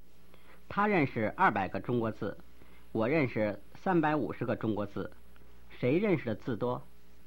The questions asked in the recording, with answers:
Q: 谁认识的字多?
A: 你认识的字多。